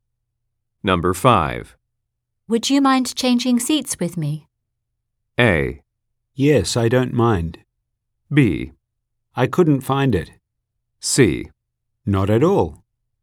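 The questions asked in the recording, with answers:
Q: Would you mind changing seats with me?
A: C: Not at all.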